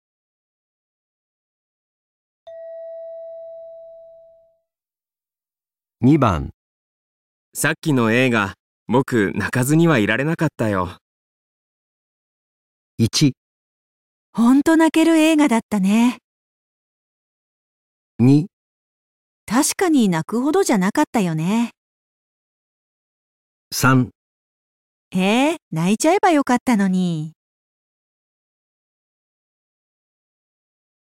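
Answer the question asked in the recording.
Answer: 本当、泣ける映画だったね。

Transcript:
3へえ、泣いちゃえばよかったのに。

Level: N2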